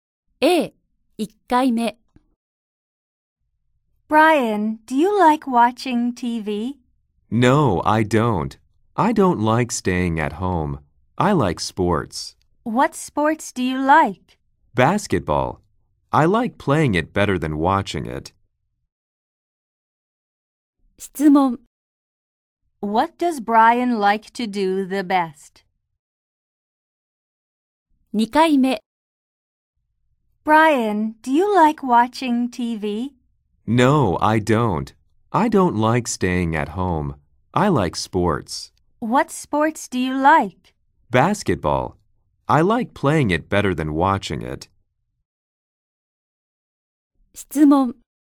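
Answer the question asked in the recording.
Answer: Play basketball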